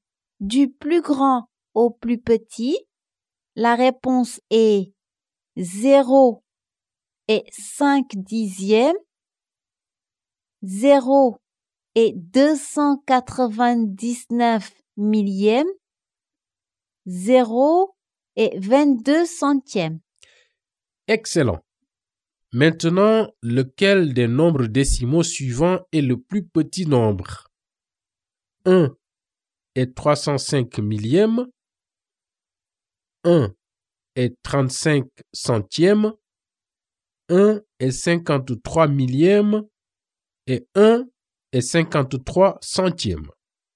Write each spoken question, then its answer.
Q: Excellent. Maintenant, lequel des nombres décimaux suivants est le plus petit nombre?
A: Le plus petit nombre, c'est 1 et 53 millièmes.